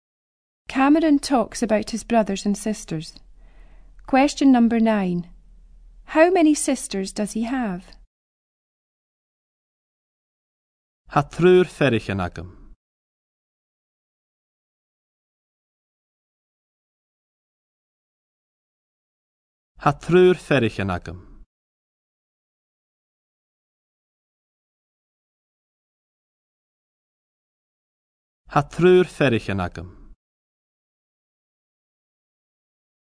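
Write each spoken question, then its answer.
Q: How many sisters does he have?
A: Three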